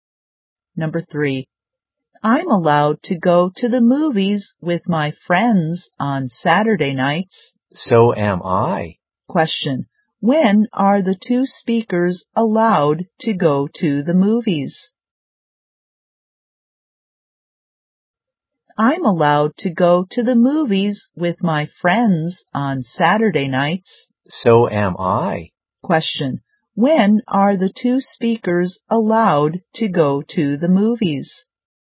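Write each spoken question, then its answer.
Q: Question,When are the two speakers allowed to go to the movies?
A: On Saturday nights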